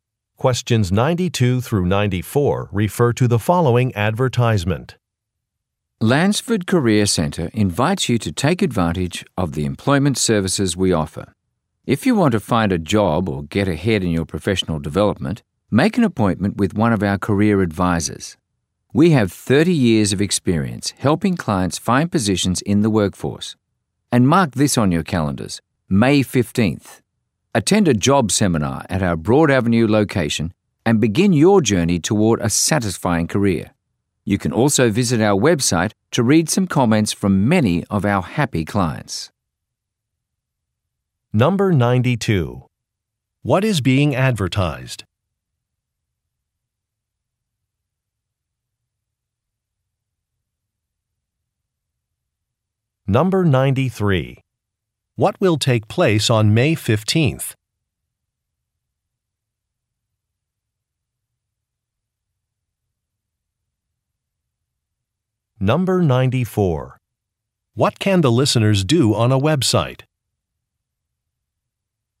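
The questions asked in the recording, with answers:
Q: What is being advertised?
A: Employment services at a career center

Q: What will take place on May 15th?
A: A job seminar

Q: What can the listeners do on a website?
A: Read comments from clients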